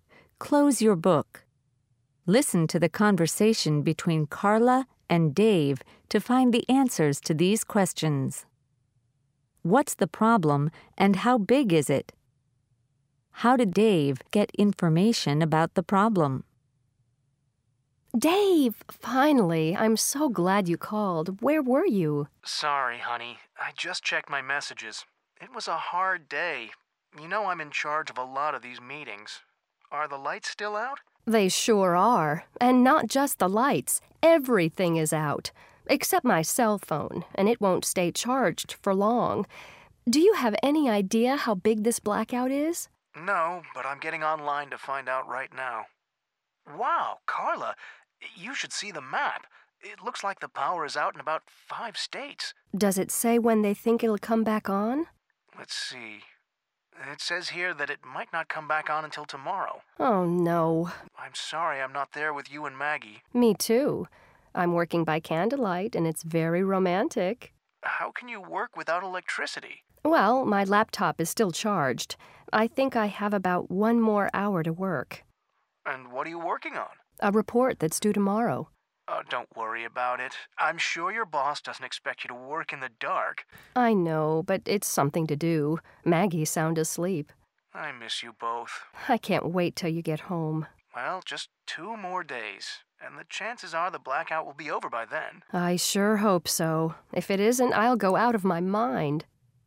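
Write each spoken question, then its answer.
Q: What's the problem and how big is it?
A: A power blackout; the power is out in about 5 states

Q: How did Dave get information about the problem?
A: He went online and looked at a map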